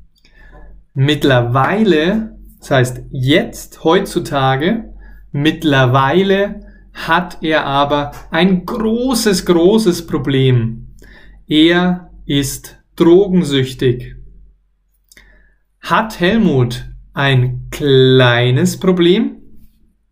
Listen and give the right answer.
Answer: Nein, nein, nein, nein. Er hat kein kleines Problem.